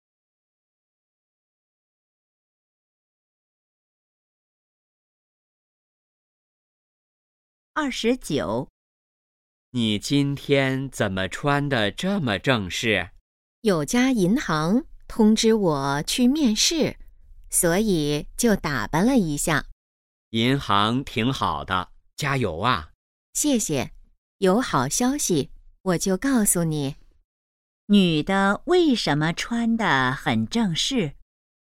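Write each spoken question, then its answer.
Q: 女的为什么穿得很正式?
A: 去银行面试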